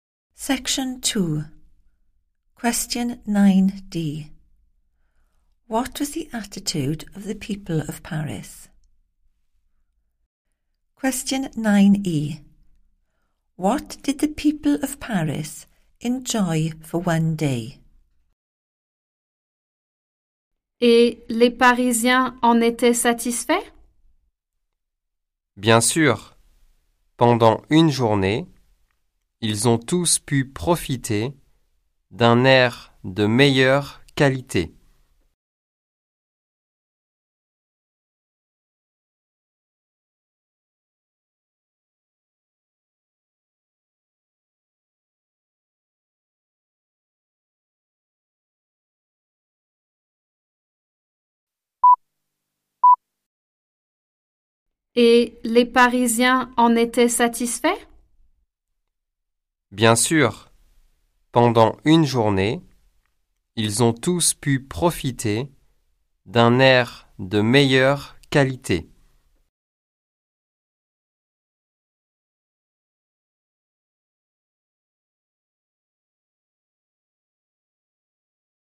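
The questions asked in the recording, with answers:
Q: What was the attitude of the people of Paris?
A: satisfied

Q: What did the people of Paris enjoy for one day?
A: better quality air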